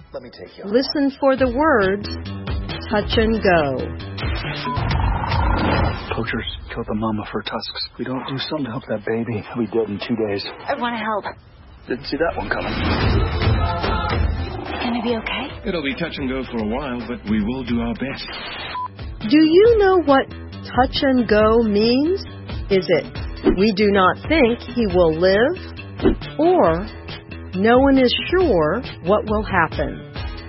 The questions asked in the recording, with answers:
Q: Do you know what touch and go means?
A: The answer is B.